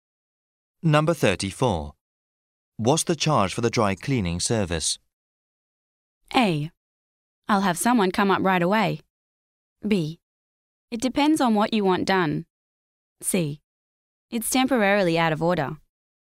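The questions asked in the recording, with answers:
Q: What's the charge for the dry cleaning service?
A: B: It depends on what you want done.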